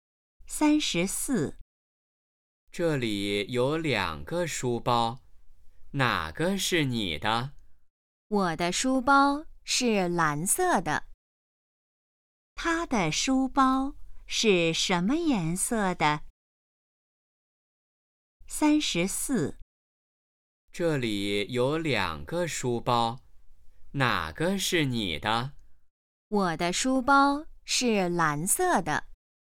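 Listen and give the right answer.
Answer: 蓝色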